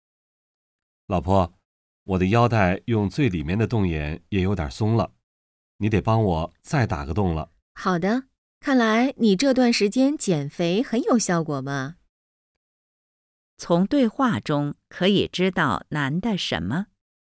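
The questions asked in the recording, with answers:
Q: 从对话中可以知道男的什么?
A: 他减肥有效果,变瘦了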